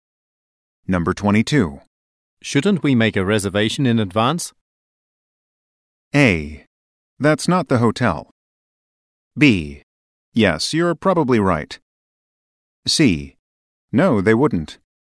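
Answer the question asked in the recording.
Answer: B: Yes, you're probably right.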